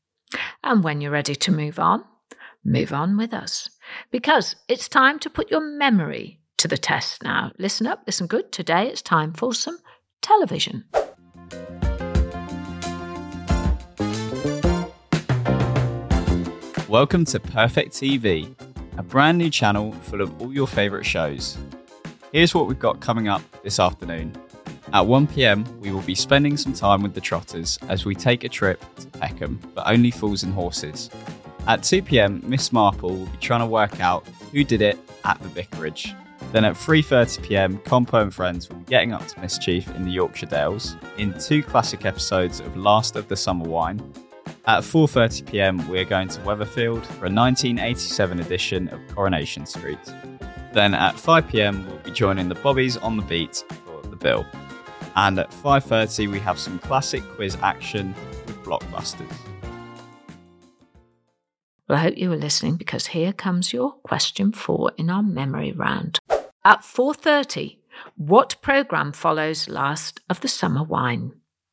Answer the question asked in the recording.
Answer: It was Coronation Street, or Corrie, as we often call it.